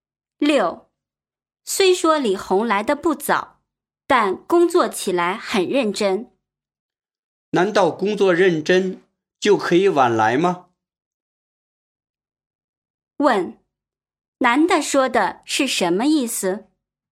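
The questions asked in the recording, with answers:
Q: 男的说的是什么意思?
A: 工作认真也不能晚来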